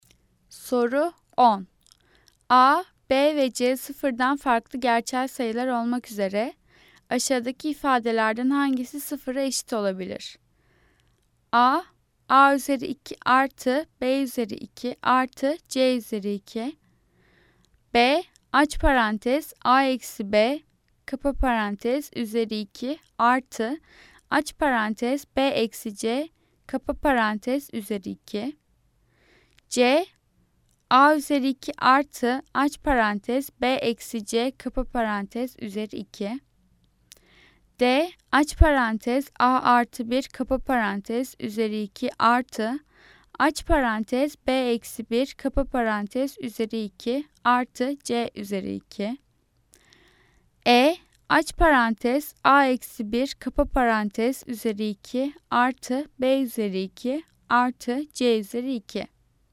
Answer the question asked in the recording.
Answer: Cevap B. Aç parantez A eksi B kapa parantez üzeri 2 artı aç parantez B eksi C kapa parantez üzeri 2.